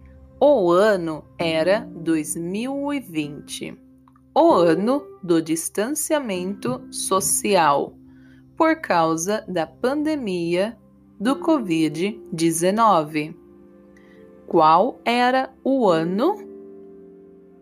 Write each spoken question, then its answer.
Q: Qual era o ano?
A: 2020.